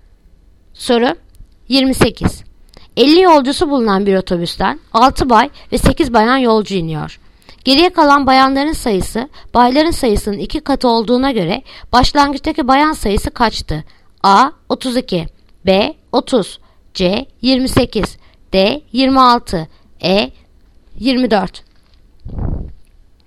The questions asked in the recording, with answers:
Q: Geriye kalan bayanların sayısı bayların sayısının 2 katı olduğuna göre başlangıçtaki bayan sayısı kaçtı?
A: Yanıt Adana 32.